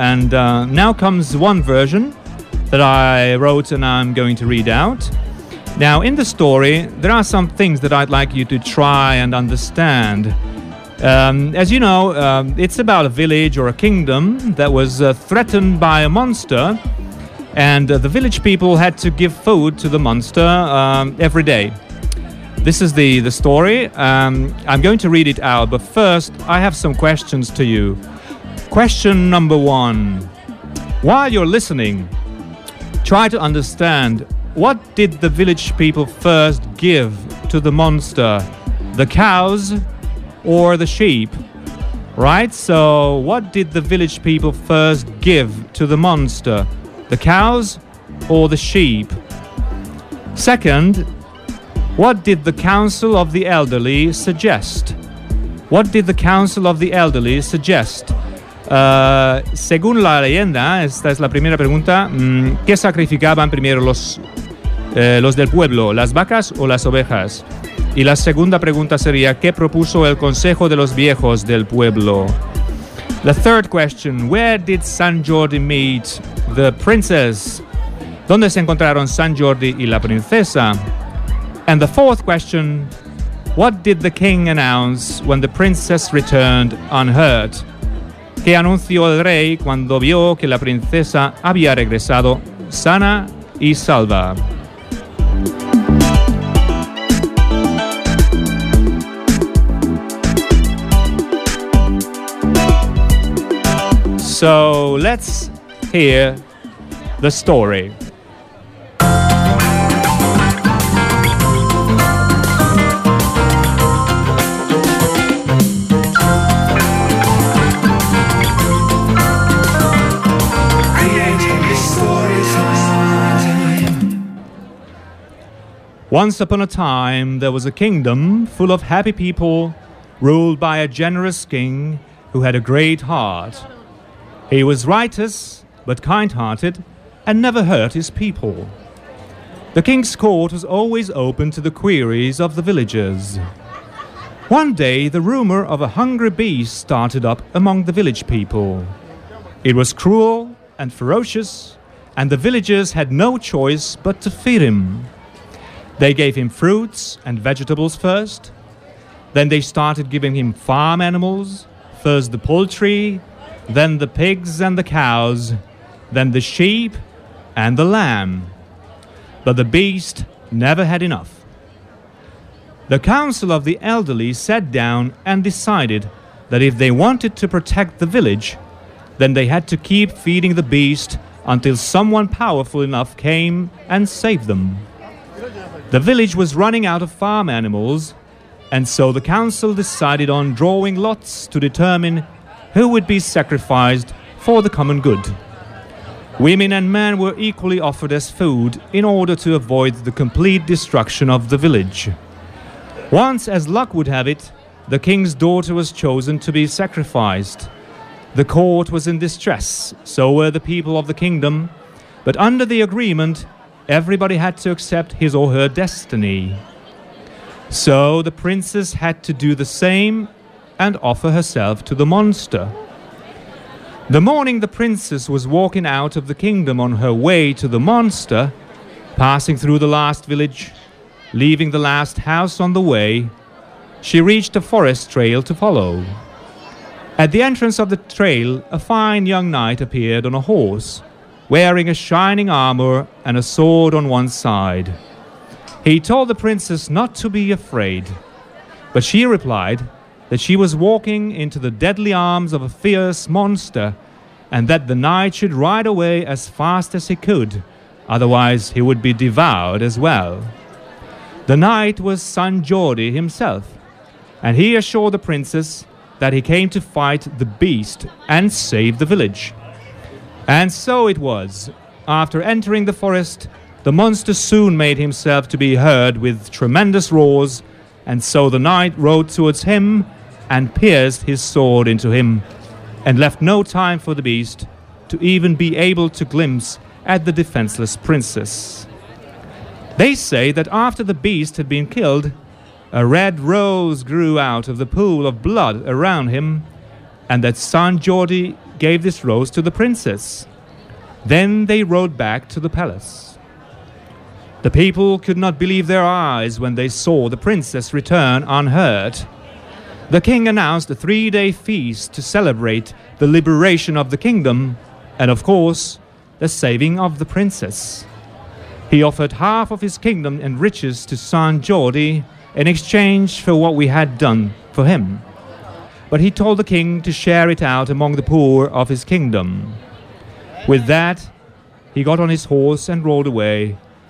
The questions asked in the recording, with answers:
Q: what did the village people first give to the monster?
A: Well, first the cows and then the sheep.

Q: what did the Council of the Elderly suggest?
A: Well, they suggested giving food to the beast, feeding the beast until someone would come and save them.

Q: where did San Jordi meet the princess?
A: Well, they met at the entrance of the forest.

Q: what did the king announce when the princess returned unhurt?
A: Well, the king announced a 3-day feast, dancing and drinking and eating.